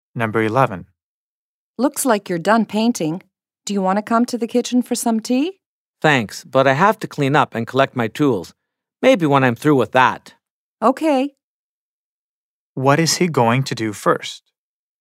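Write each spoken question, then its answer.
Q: What is he going to do first?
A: Clean up and collect his tools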